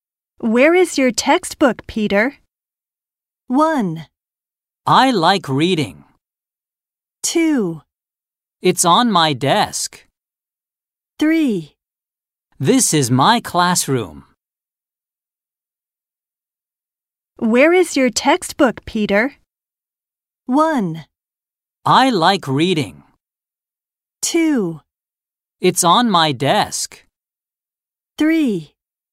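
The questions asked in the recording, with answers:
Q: Where is your textbook, Peter?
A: 2: It's on my desk.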